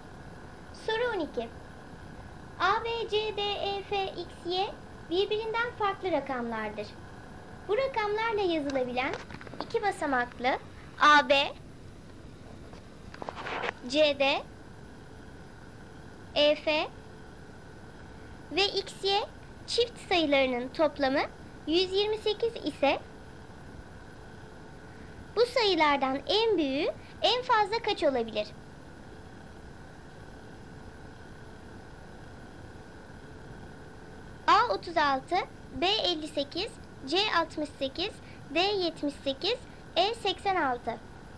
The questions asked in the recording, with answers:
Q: CD, EF ve XY çift sayılarının toplamı 128 ise bu sayılardan en büyüğü en fazla kaç olabilir?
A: Doğru cevap B 58.